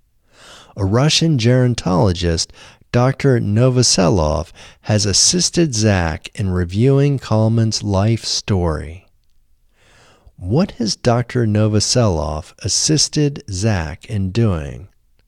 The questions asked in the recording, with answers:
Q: What has Dr. Novoselov assisted Zak in doing?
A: Dr. Novoselov has assisted Zak in reviewing Kalman's life story.